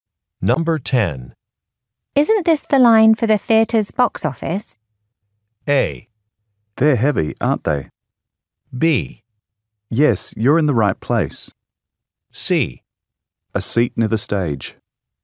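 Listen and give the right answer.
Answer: B: Yes, you're in the right place.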